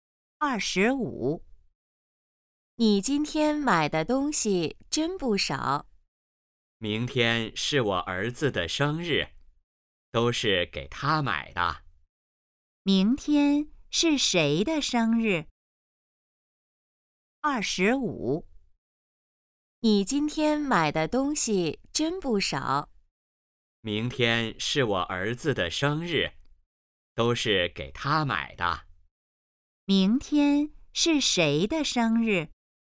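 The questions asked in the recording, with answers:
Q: 明天是谁的生日?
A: 儿子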